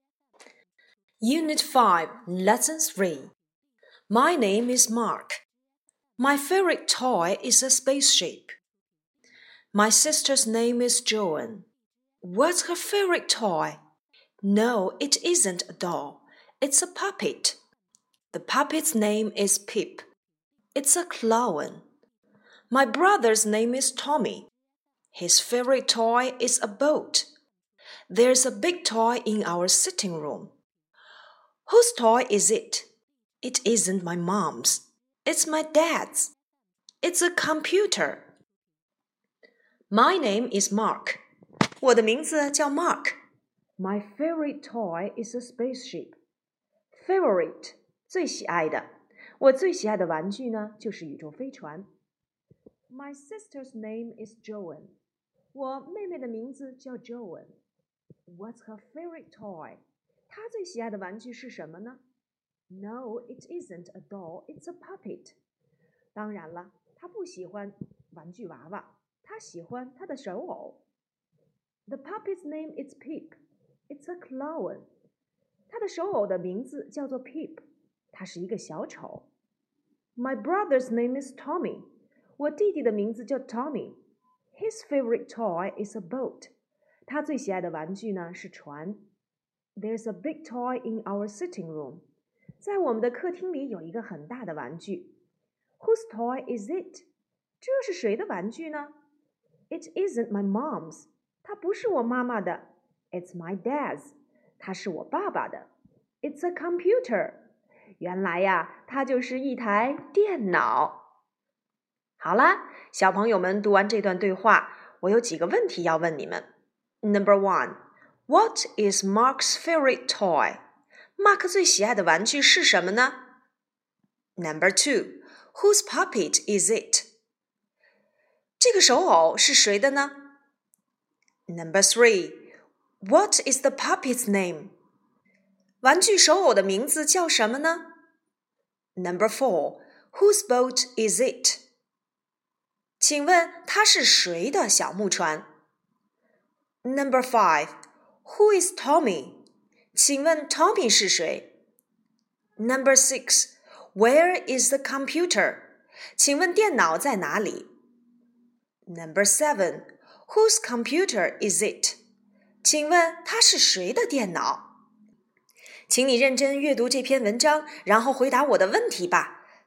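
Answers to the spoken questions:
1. A spaceship
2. Joan's
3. Pip
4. Tommy's
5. Mark's brother
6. In the sitting room
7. Mark's dad's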